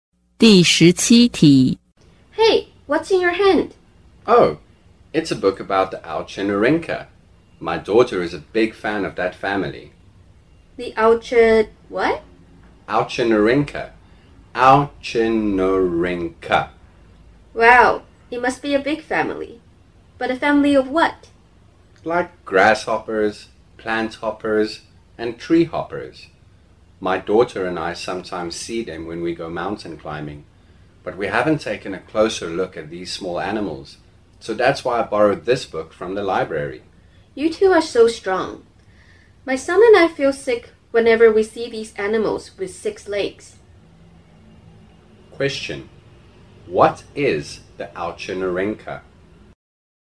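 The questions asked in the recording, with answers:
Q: Question. What is the Alchinarenka?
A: A family of insects, like grasshoppers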